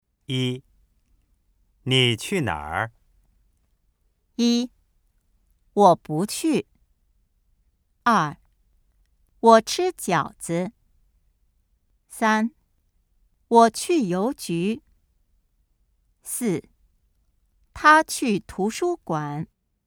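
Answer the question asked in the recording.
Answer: 三: 我去邮局。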